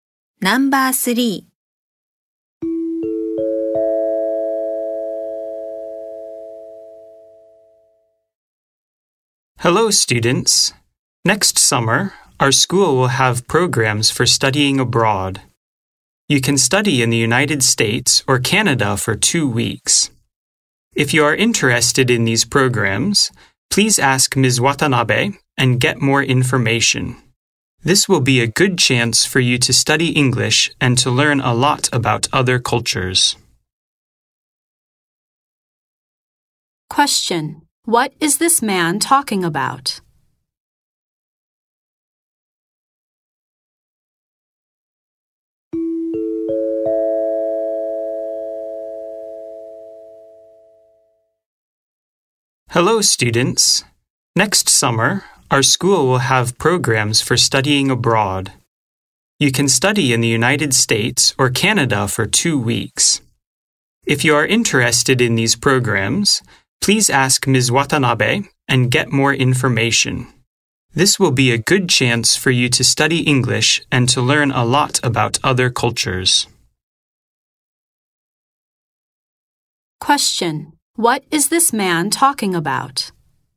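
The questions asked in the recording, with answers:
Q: What is this man talking about?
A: Programs for studying abroad next summer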